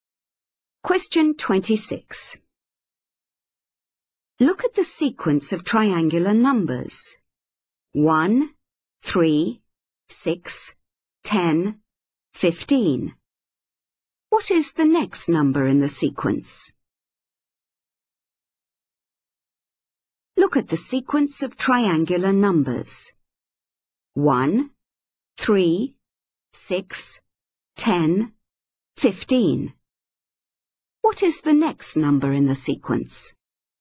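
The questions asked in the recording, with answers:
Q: What is the next number in the sequence?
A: 21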